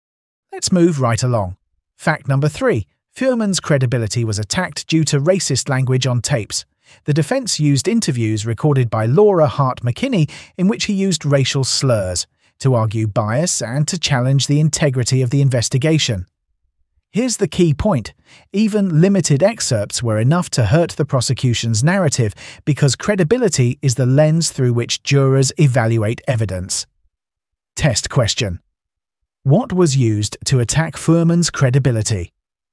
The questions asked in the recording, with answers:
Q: What was used to attack Fuhrman's credibility?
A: Correct answer. Tapes of racist language.